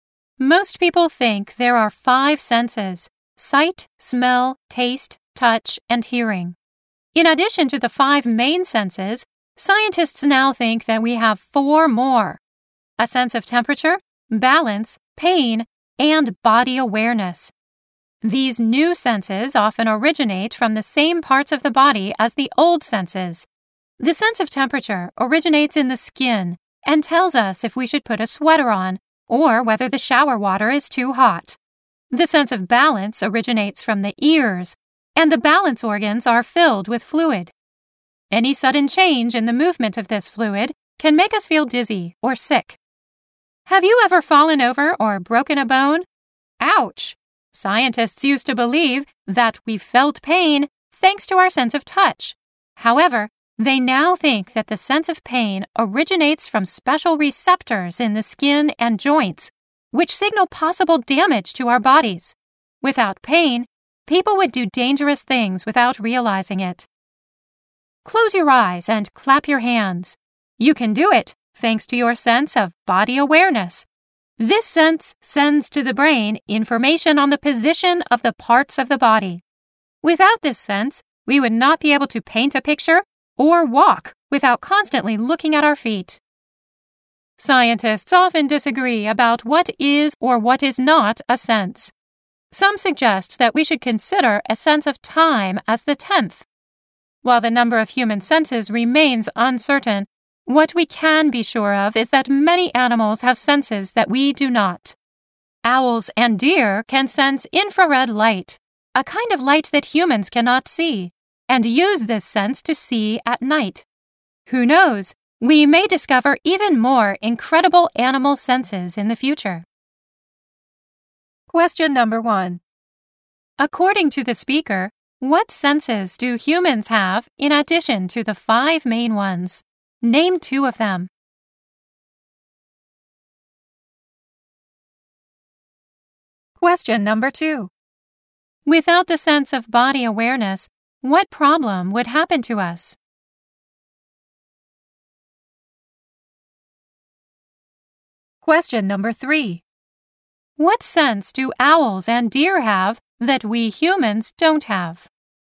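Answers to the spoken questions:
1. Two of: temperature, balance, pain, body awareness
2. We could not paint a picture or walk without constantly looking at our feet
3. They can sense infrared light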